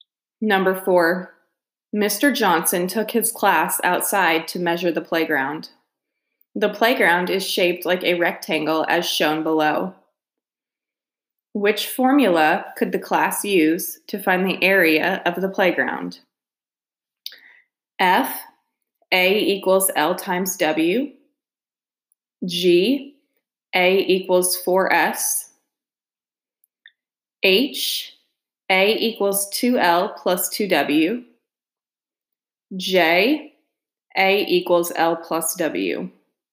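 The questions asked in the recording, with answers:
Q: Which formula could the class use to find the area of the playground?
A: F: A equals L times W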